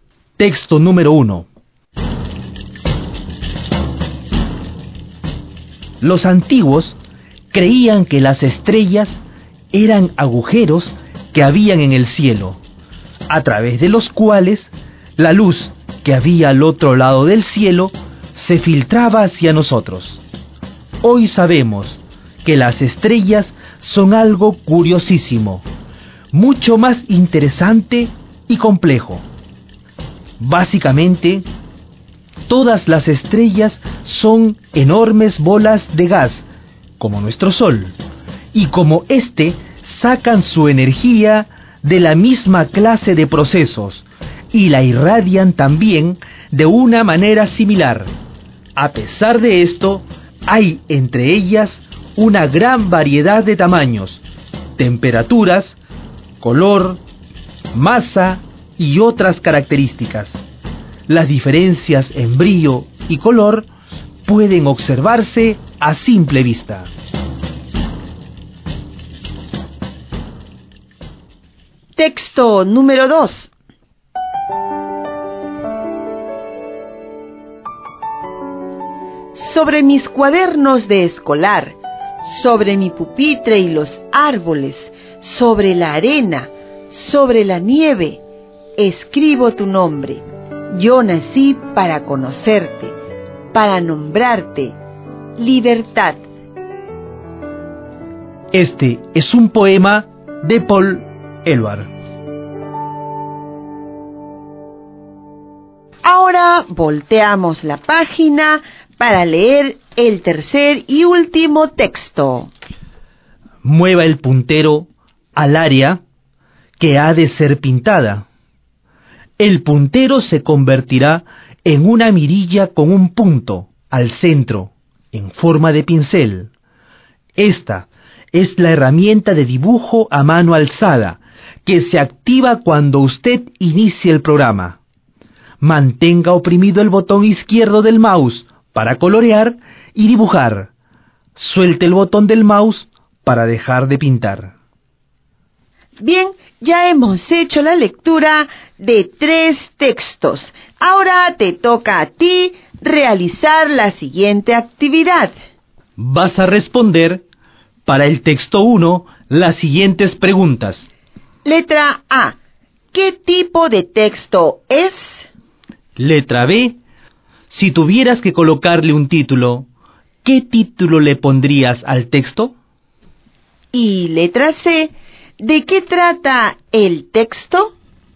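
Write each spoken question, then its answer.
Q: ¿De qué trata el texto?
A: De qué son las estrellas: enormes bolas de gas como el Sol, con distintos tamaños, temperaturas, colores y masas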